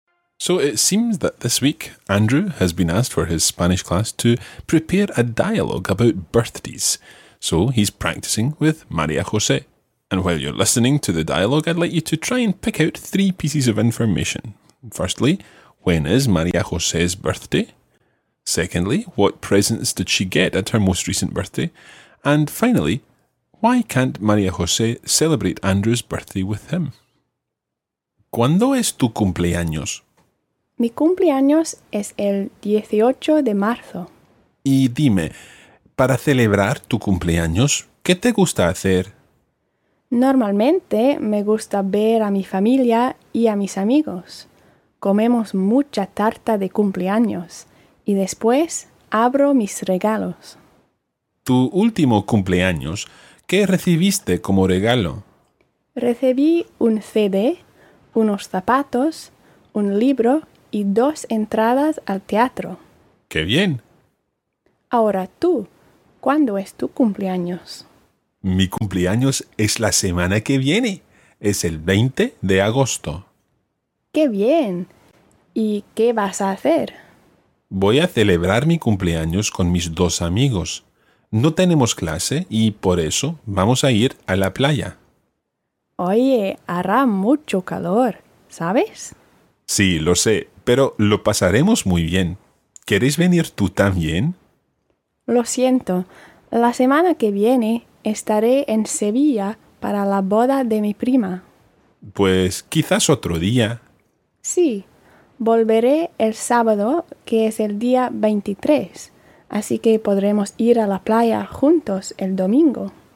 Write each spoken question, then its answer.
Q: Firstly, when is María José's birthday?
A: Yeah, it was the 18th of March.

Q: Secondly, what presents did she get at her most recent birthday?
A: A book and theatre tickets.

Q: And finally, why can't María José celebrate Andrew's birthday with him?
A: Okay, so she's going to her cousin's wedding in Seville.